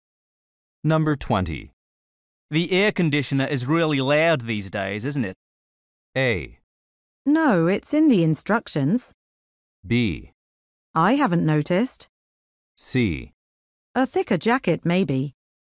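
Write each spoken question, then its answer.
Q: The air conditioner is really loud these days, isn't it?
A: B: I haven't noticed.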